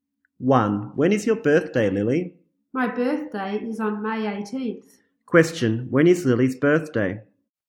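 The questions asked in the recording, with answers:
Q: When is Lily's birthday?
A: On May 18th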